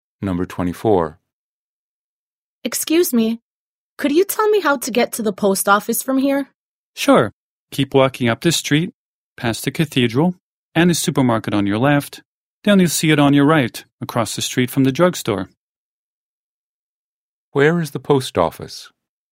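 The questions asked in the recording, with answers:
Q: Where is the post office?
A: Up the street past the cathedral and supermarket, on the right, across the street from the drugstore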